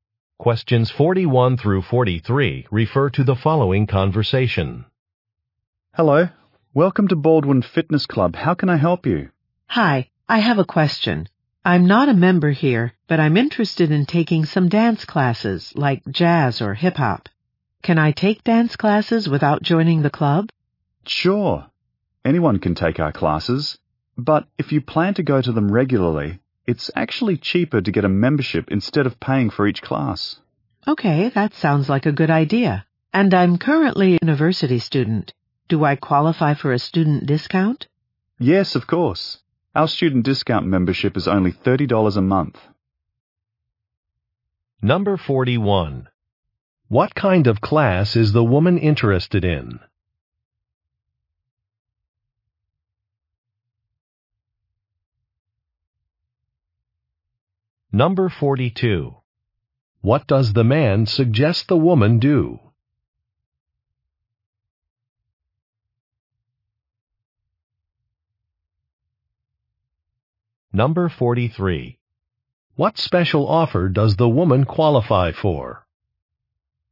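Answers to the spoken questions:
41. Dance
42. Get a membership
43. A student discount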